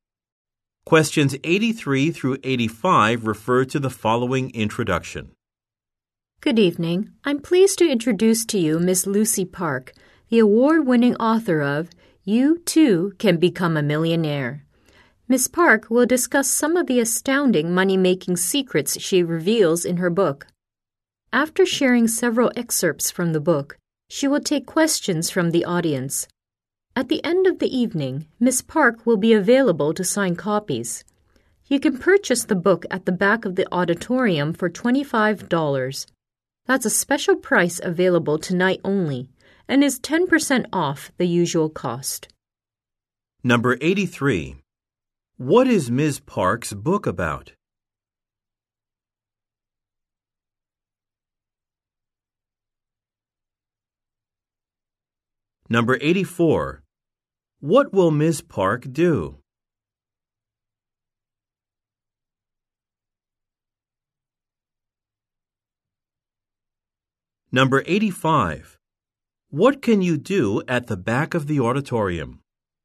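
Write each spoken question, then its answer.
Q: What is Ms. Park's book about?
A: Making money

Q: What will Ms. Park do?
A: Read excerpts, answer questions and sign books

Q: What can you do at the back of the auditorium?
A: Buy the book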